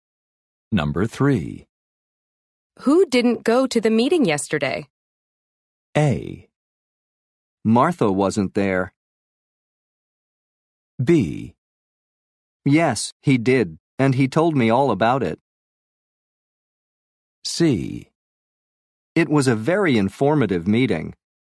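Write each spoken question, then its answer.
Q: Who didn't go to the meeting yesterday?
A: A: Martha wasn't there.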